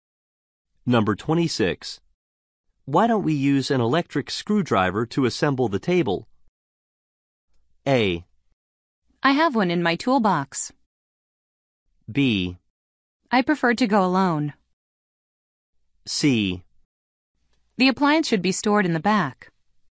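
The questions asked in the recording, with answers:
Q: Why don't we use an electric screwdriver to assemble the table?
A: A: I have one in my toolbox.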